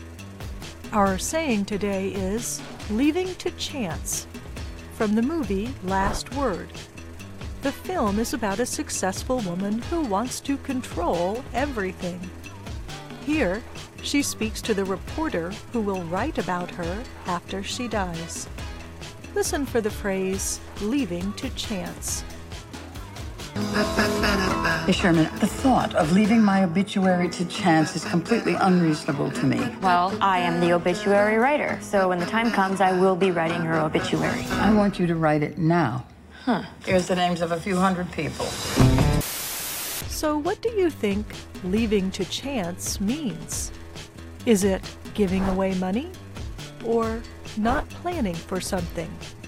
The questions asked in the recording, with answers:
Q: So what do you think leaving to chance means?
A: Leaving to chance means not planning for something.